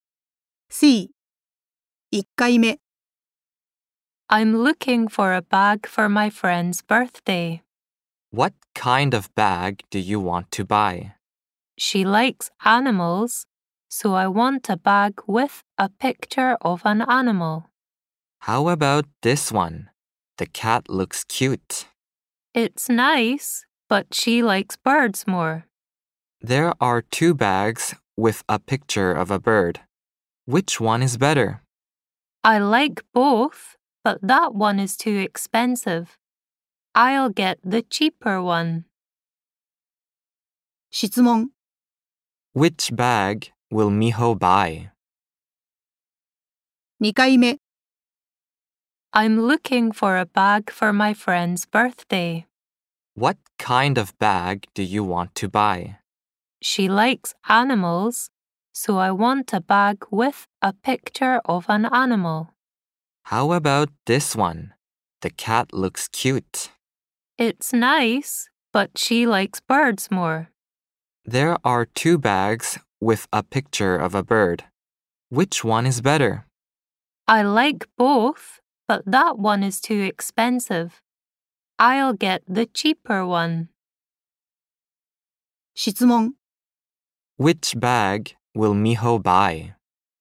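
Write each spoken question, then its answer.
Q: Which bag will Miho buy?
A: The cheaper bag with a picture of a bird.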